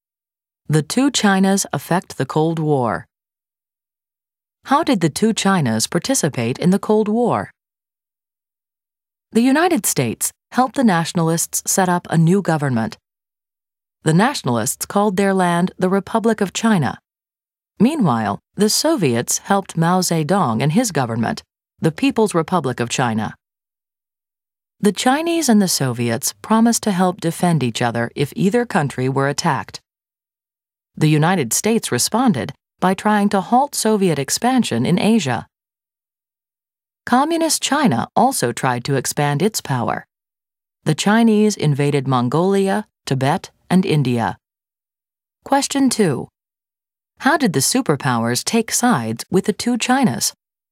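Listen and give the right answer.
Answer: The United States helped the nationalists (Republic of China); the Soviets helped Mao's People's Republic of China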